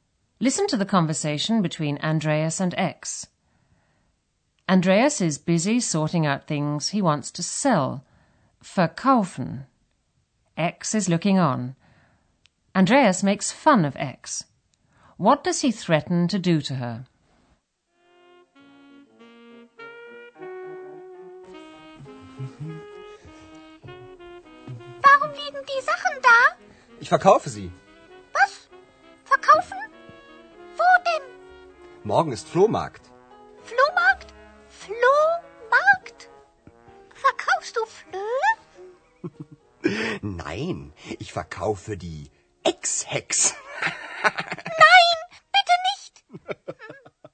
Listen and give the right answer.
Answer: Andreas threatens to sell X along with his belongings.